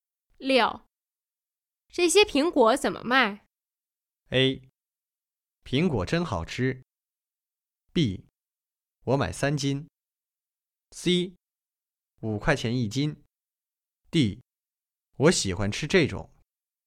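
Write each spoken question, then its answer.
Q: 这些苹果怎么卖?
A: C: 五块钱一斤。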